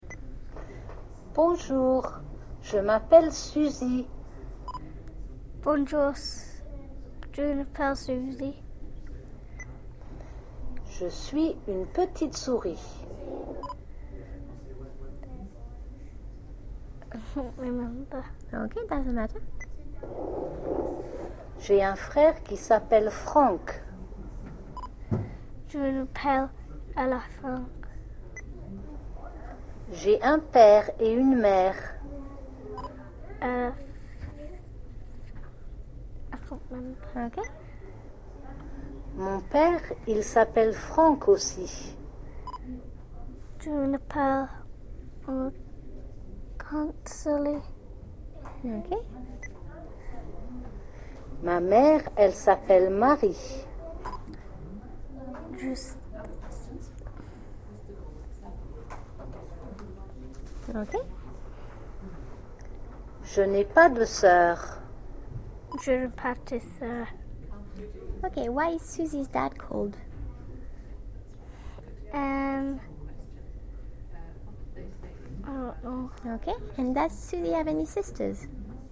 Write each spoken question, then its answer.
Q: Ok, and does Susie have any sisters?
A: No.